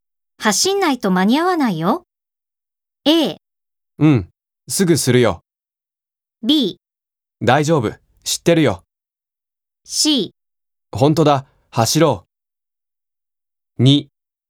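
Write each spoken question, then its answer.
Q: 走んないと間に合わないよ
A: C: 本当だ、走ろう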